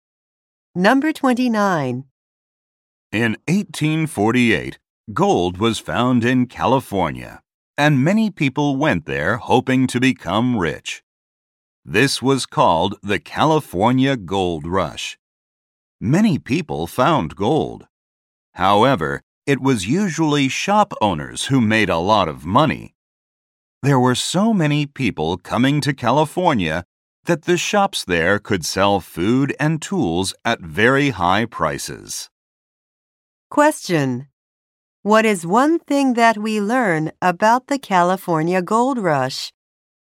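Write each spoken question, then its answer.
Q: What is one thing that we learn about the California Gold Rush?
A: Shop owners usually made a lot of money.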